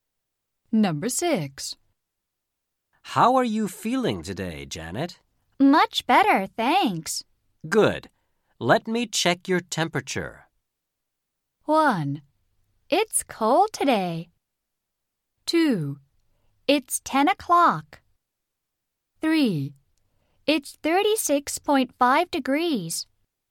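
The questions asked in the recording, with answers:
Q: Good. Let me check your temperature.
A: 3: It's 36.5 degrees.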